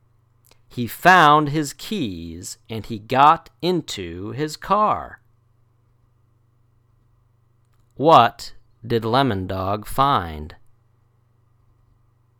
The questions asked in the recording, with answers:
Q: What did Lemon Dog find?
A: His keys.